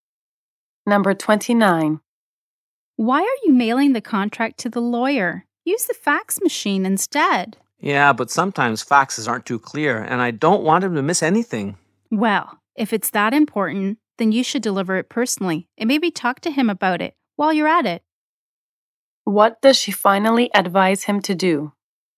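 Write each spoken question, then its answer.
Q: What does she finally advise him to do?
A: Deliver the contract personally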